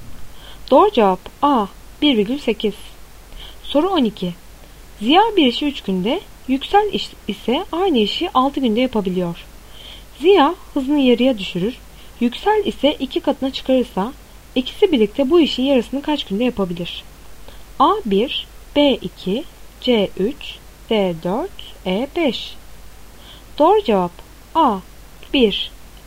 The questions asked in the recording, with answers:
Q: Ziya hızını yarıya düşürür, Yüksel ise 2 katına çıkarırsa ikisi birlikte bu işin yarısını kaç günde yapabilir?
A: Doğru cevap A 1.